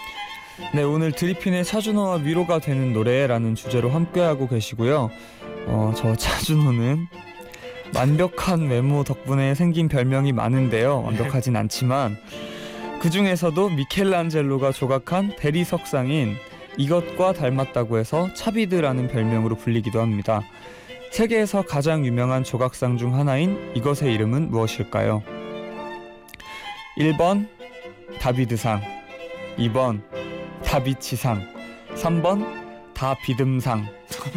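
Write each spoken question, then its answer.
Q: 세계에서 가장 유명한 조각상 중 하나인 이것의 이름은 무엇일까요?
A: 1번: 다비드상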